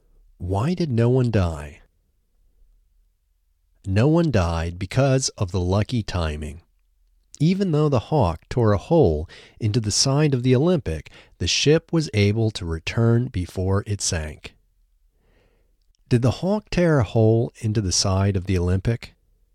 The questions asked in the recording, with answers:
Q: Did the Hawk tear a hole into the side of the Olympic?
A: Yes, the Hawk tore a hole into the side of the Olympic.